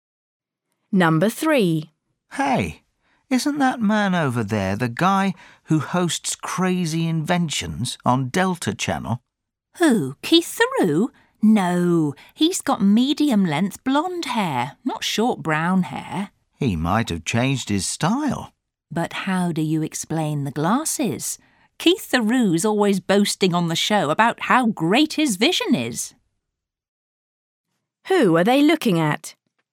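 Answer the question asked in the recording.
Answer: a man with short brown hair and glasses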